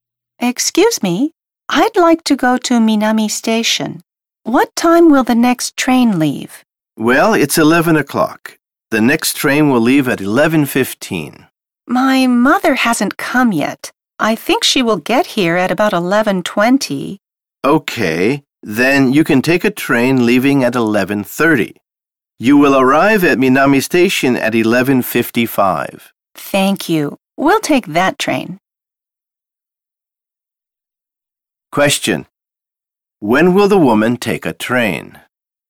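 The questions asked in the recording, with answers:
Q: When will the woman take a train?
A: At 11:30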